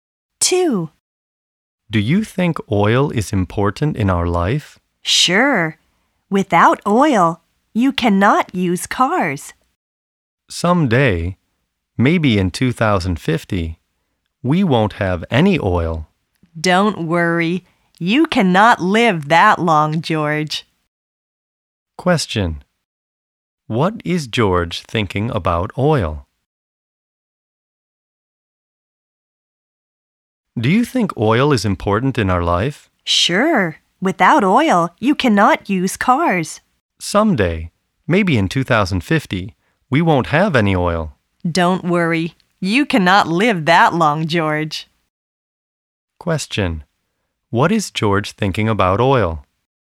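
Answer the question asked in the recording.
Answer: Oil is important, and we may have none by 2050.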